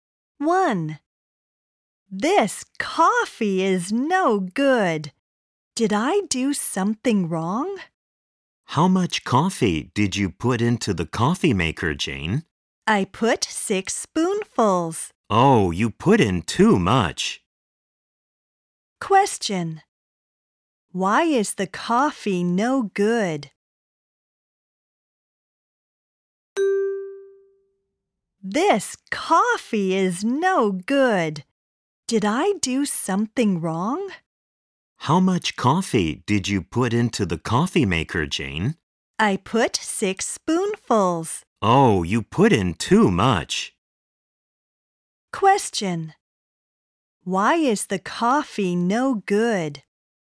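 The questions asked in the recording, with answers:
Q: Why is the coffee no good?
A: Jane put in too much coffee (6 spoonfuls).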